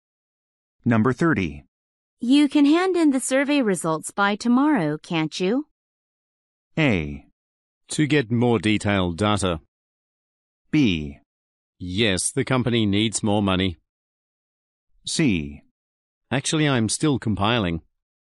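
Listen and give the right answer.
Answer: C: Actually, I'm still compiling.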